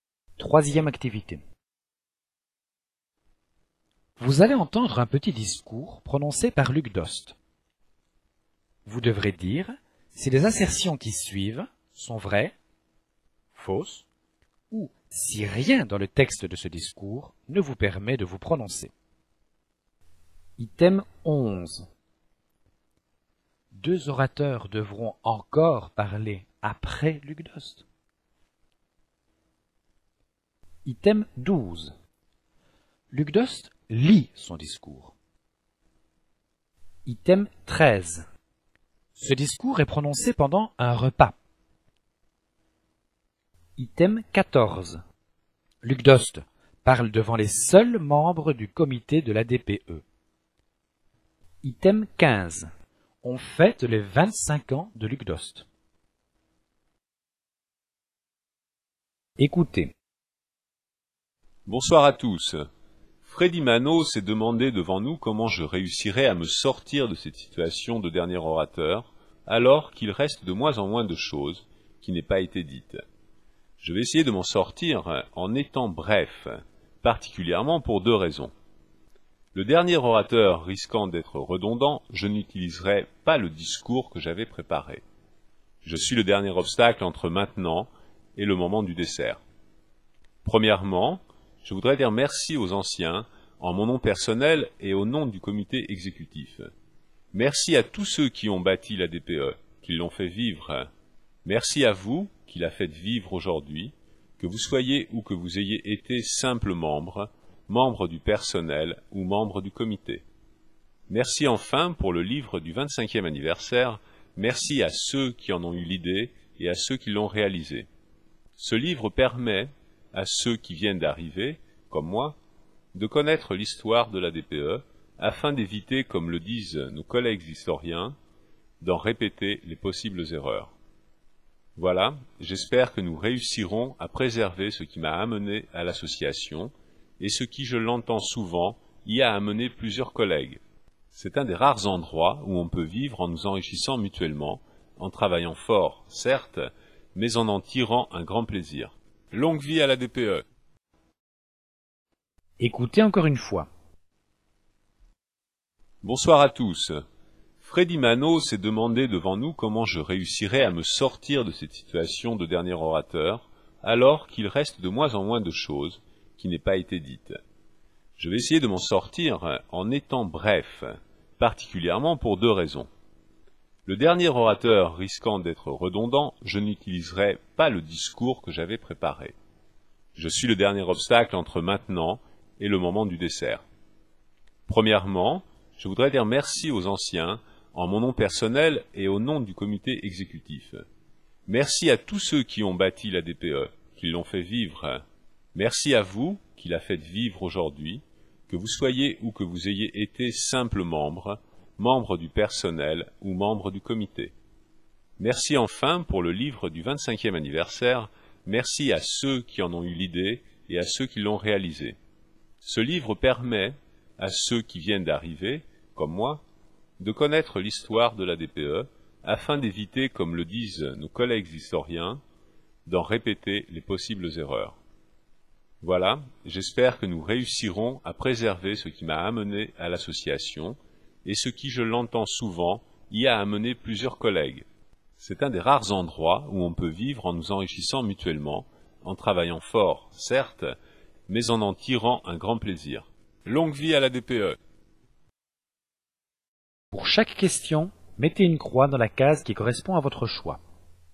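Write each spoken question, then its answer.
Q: Deux orateurs devront encore parler après Luc Dost.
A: Faux

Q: Luc Dost lit son discours.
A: Faux

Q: Ce discours est prononcé pendant un repas.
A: Vrai

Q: On fête les 25 ans de Luc Dost.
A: Faux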